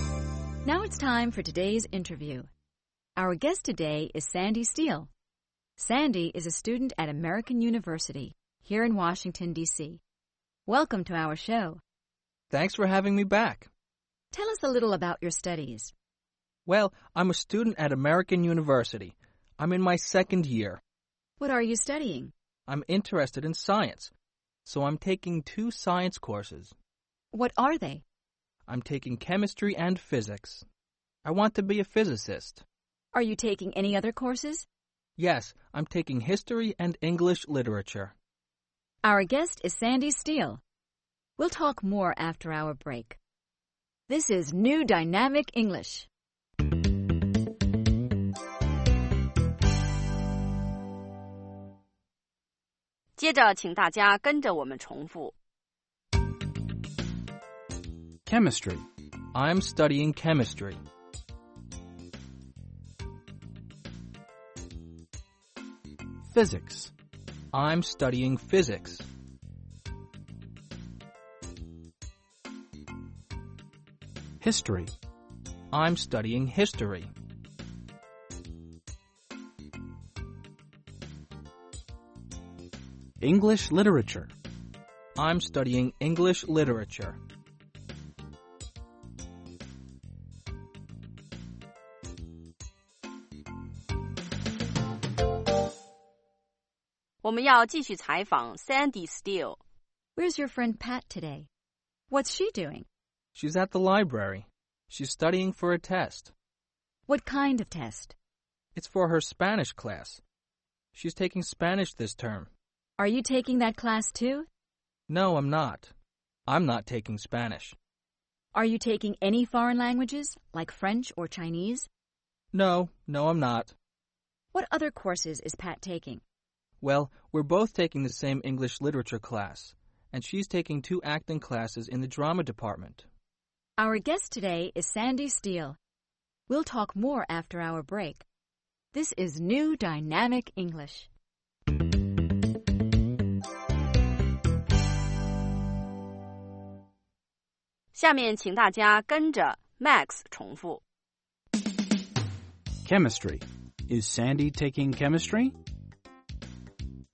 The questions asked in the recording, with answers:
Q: Is Sandy taking chemistry?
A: Yes, he is. He's taking chemistry.